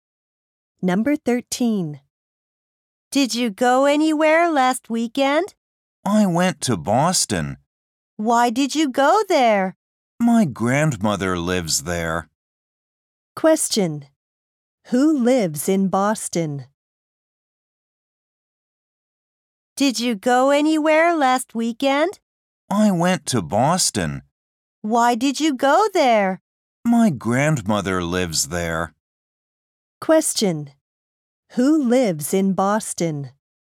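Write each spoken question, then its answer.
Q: Who lives in Boston?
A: The speaker's grandmother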